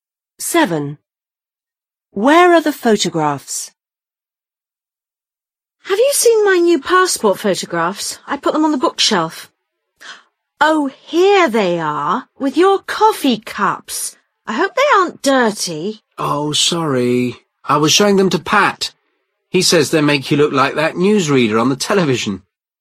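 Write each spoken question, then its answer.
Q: Where are the photographs?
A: With the coffee cups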